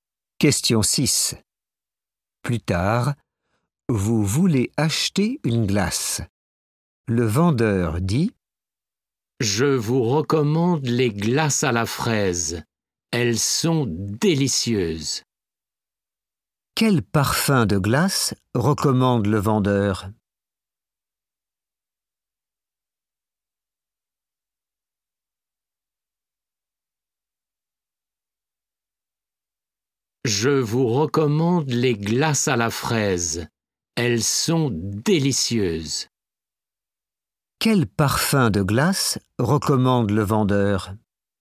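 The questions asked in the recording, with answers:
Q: Quel parfum de glace recommande le vendeur ?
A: La fraise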